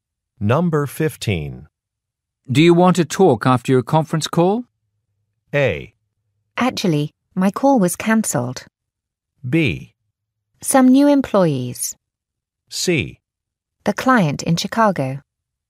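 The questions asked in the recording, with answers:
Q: Do you want to talk after your conference call?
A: A: Actually, my call was cancelled.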